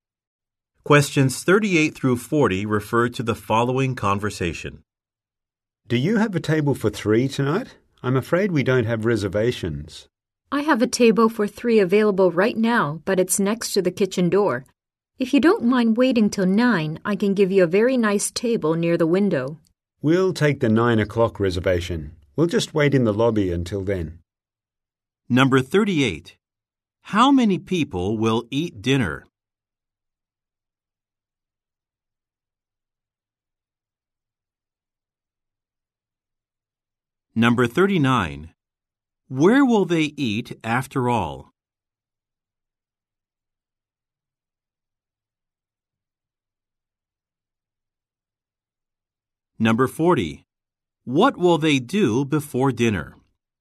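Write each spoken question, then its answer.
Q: How many people will eat dinner?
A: Three

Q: Where will they eat after all?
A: At a table near the window

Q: What will they do before dinner?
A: Wait in the lobby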